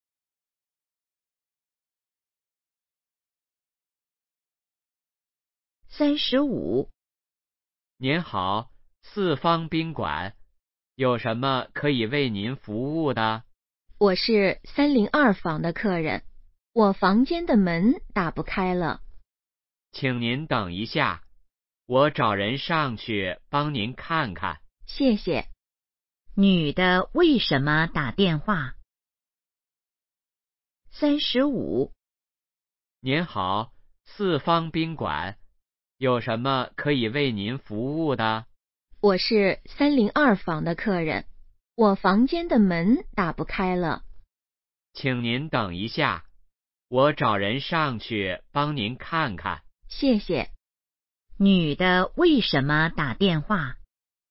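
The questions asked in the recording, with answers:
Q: 女的为什么打电话?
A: 房间的门打不开了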